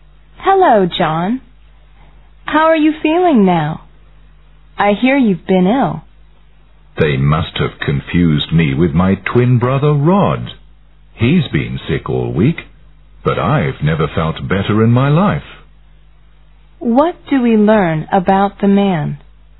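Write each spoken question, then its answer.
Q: What do we learn about the man?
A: He is not ill; it is his twin brother Rod who has been sick.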